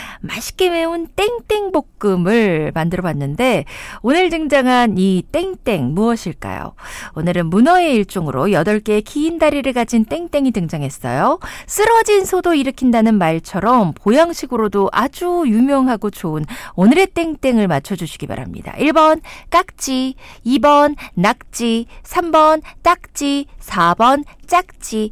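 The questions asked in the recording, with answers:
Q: 맛있게 매운 땡땡볶음을 만들어 봤는데 오늘 등장한 이 땡땡 무엇일까요?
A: 2: 낙지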